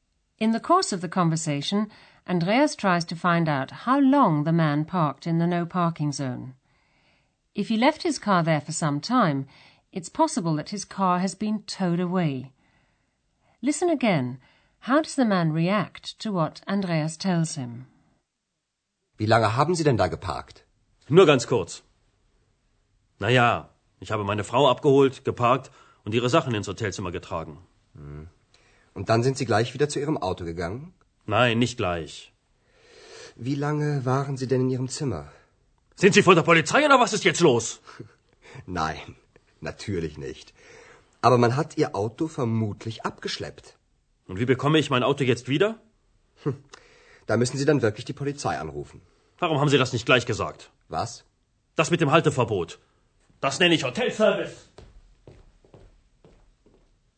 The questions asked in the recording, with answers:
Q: How does the man react to what Andreas tells him?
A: The man is annoyed about his car and takes it out on Andreas.